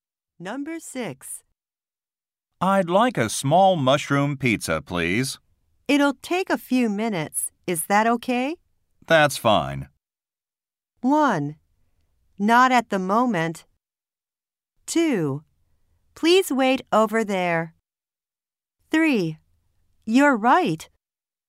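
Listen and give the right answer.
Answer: 2: Please wait over there.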